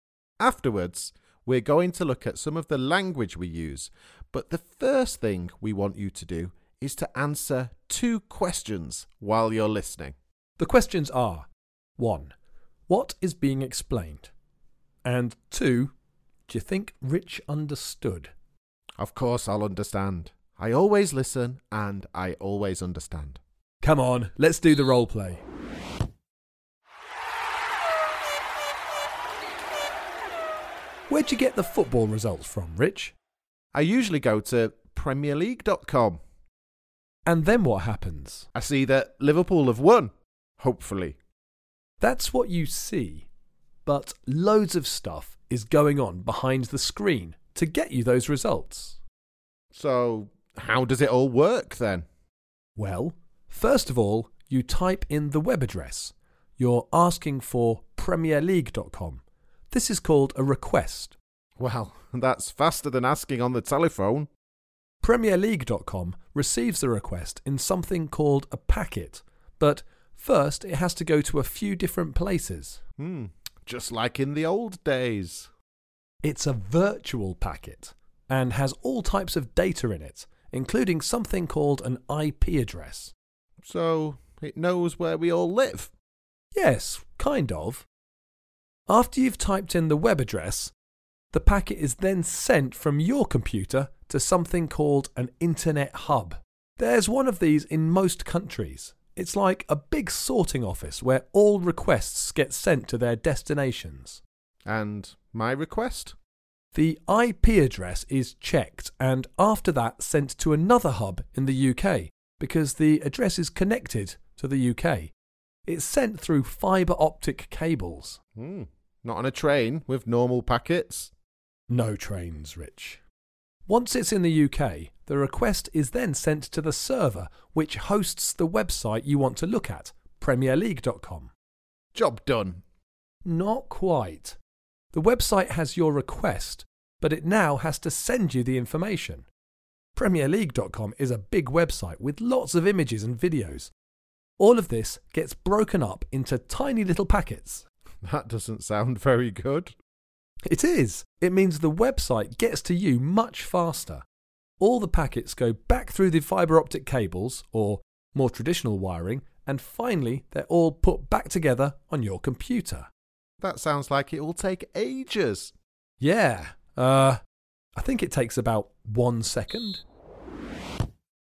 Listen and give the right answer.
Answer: the internet